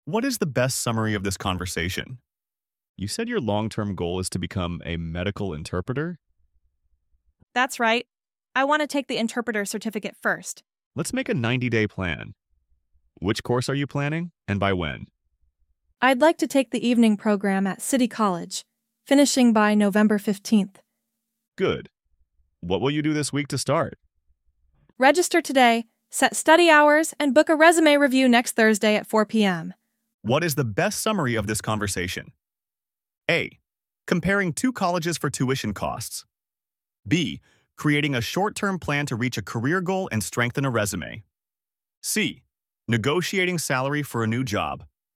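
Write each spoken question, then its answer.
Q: What is the best summary of this conversation?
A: B: Creating a short-term plan to reach a career goal and strengthen a resume.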